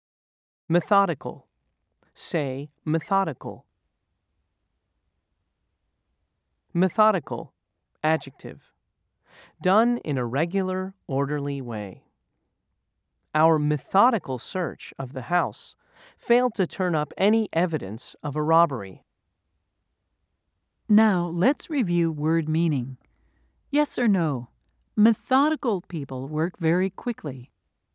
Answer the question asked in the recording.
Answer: If you said no, you were correct.